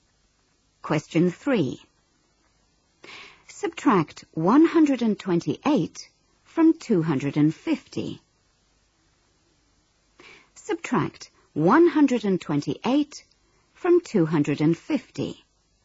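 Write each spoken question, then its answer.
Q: Subtract 128 from 250.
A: 122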